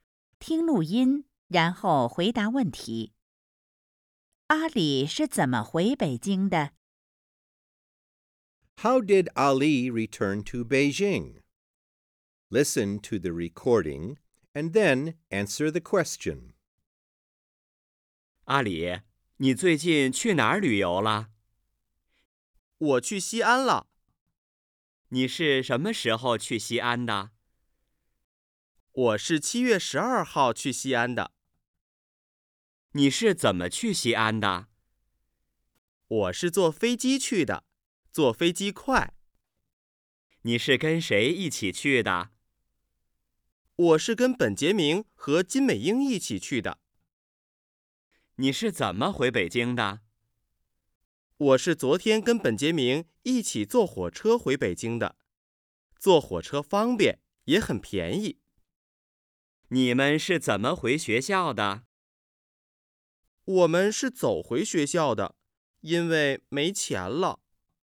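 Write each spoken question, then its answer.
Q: 阿里是怎么回北京的?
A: 坐火车回北京的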